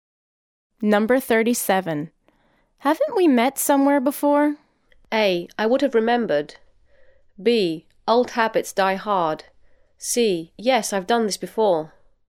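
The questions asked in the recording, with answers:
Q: Haven't we met somewhere before?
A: A: I would have remembered.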